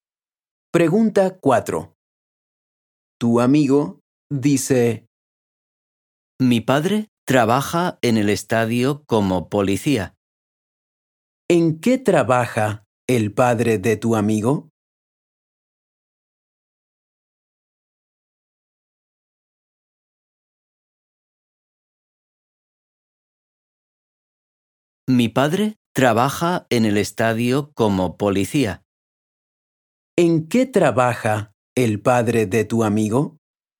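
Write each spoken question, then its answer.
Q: ¿En qué trabaja el padre de tu amigo?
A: Es policía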